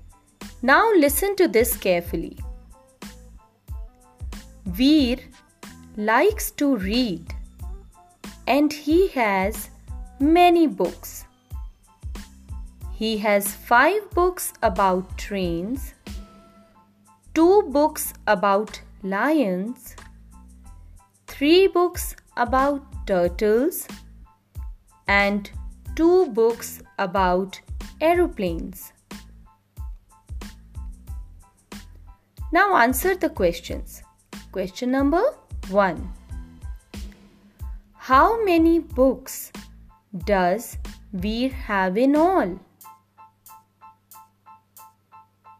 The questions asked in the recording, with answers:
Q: How many books does Veer have in all?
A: So Veer has 12 books in all.